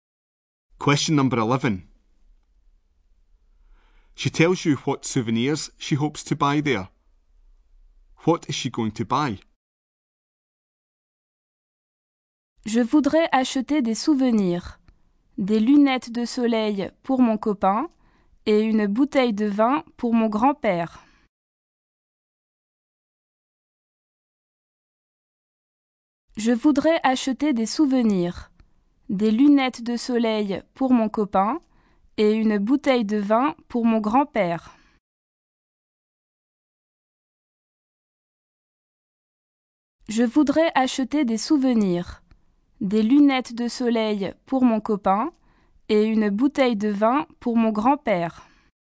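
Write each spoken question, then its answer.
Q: What is she going to buy?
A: Sunglasses for her boyfriend and a bottle of wine for her grandfather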